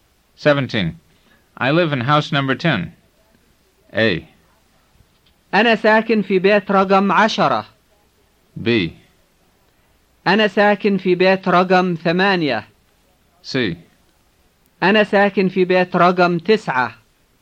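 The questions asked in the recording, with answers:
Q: I live in house number 10.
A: A: أنا ساكن في بيت رقم 10.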